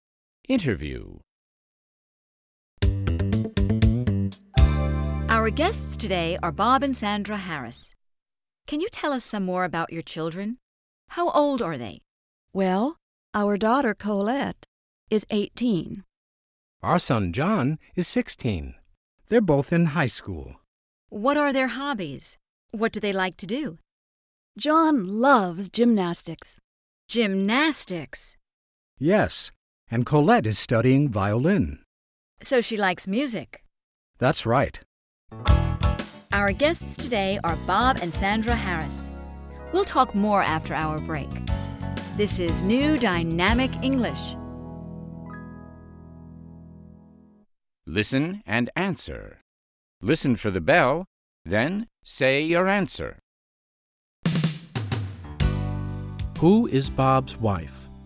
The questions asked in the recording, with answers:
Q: Who is Bob's wife?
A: Sandra is Bob's wife.